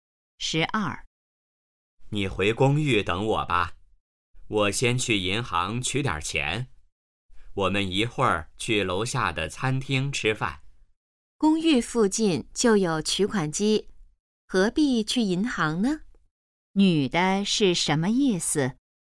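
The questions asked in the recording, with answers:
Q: 女的是什么意思?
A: 不必去银行,公寓附近有取款机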